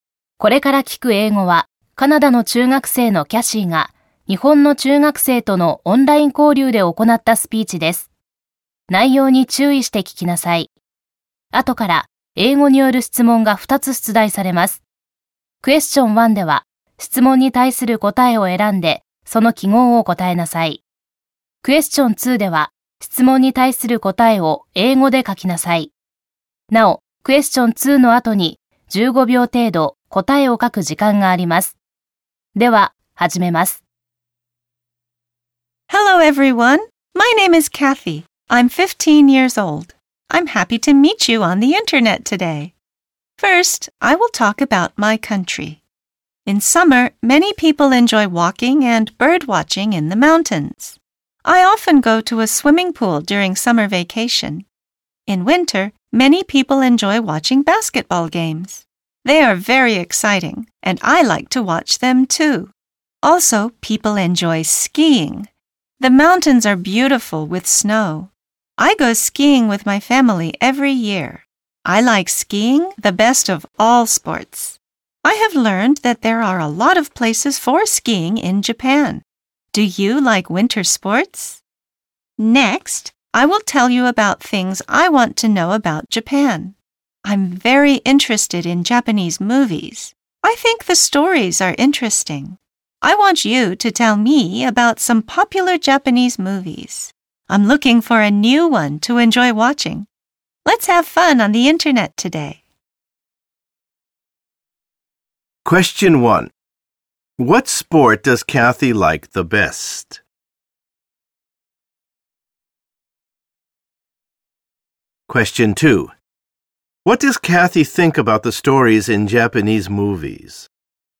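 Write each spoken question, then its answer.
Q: What sport does Kathy like the best?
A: Skiing

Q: What does Kathy think about the stories in Japanese movies?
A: She thinks they are interesting.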